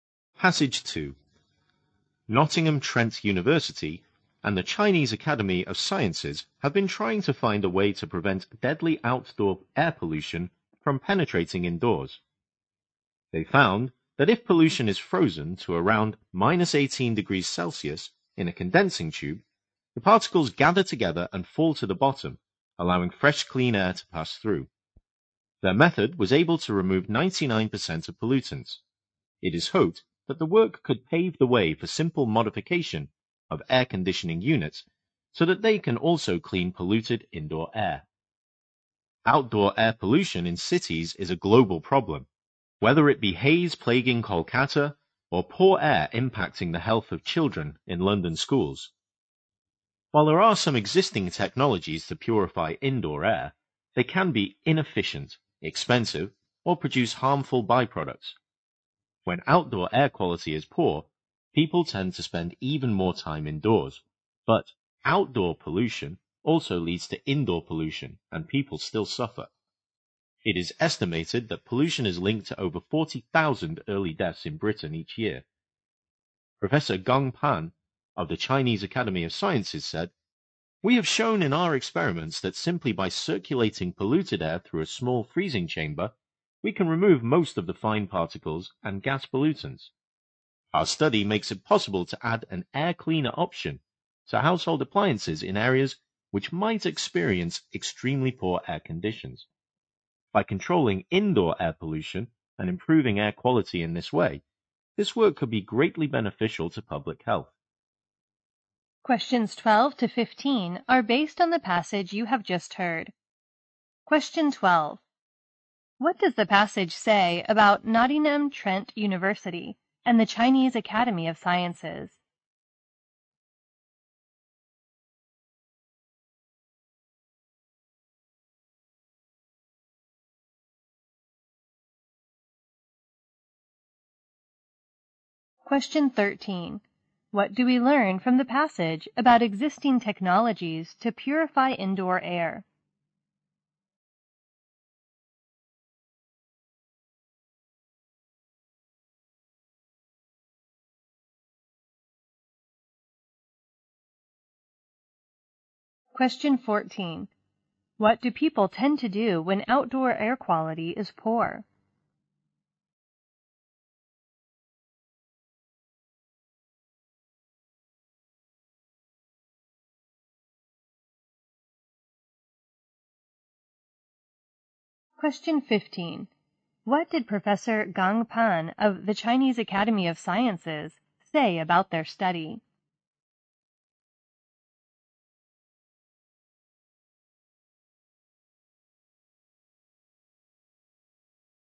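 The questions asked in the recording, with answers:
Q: What does the passage say about Nottingham Trent University and the Chinese Academy of Sciences?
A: They have been trying to stop outdoor air pollution getting indoors

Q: What do we learn from the passage about existing technologies to purify indoor air?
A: They can be inefficient, expensive or produce harmful byproducts

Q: What do people tend to do when outdoor air quality is poor?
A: Spend even more time indoors

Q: What did Professor Gong Pan of the Chinese Academy of Sciences say about their study?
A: It makes it possible to add an air cleaner option to household appliances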